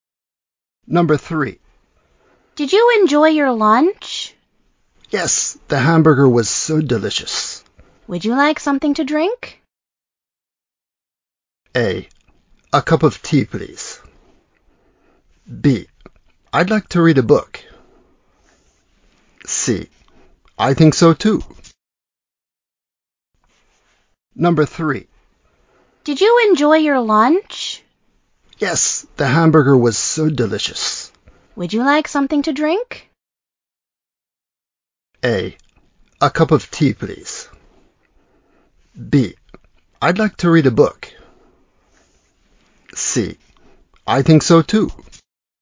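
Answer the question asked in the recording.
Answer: A: A cup of tea, please.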